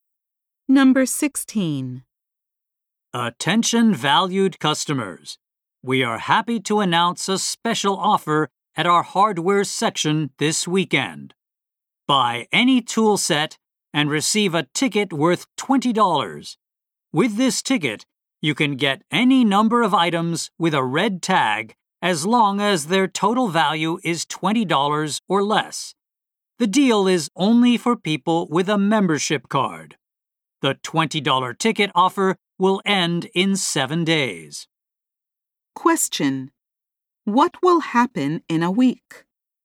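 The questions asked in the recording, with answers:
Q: What will happen in a week?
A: The $20 ticket offer will end.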